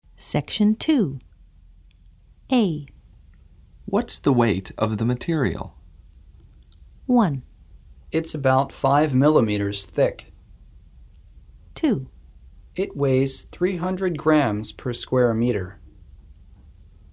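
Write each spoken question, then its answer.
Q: What's the weight of the material?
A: 2: It weighs 300 grams per square meter.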